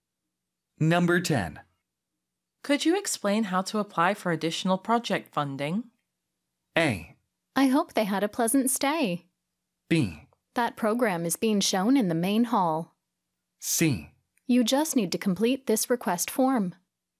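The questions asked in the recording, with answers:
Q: Could you explain how to apply for additional project funding?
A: C: You just need to complete this request form.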